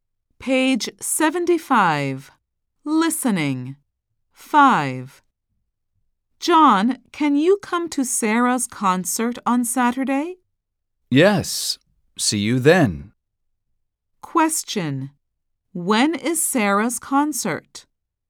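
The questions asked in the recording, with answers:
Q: When is Sarah's concert?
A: On Saturday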